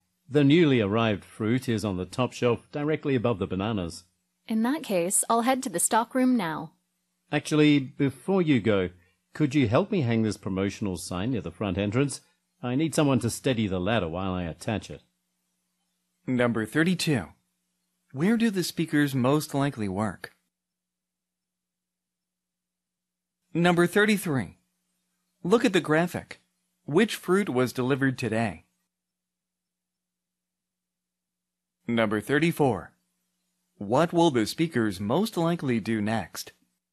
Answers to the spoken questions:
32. 아무래도 C번 at a grocery store.
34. D번, put up a sign.